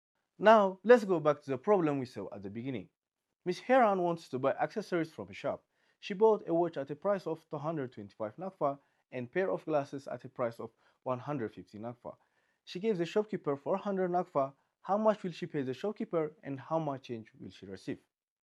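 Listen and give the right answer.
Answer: She pays 375 Nakfa and receives 25 Nakfa change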